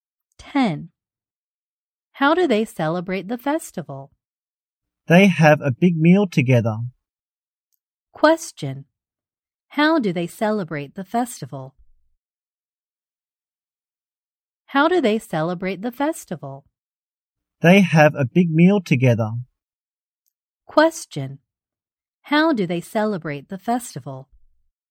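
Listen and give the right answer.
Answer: They have a big meal together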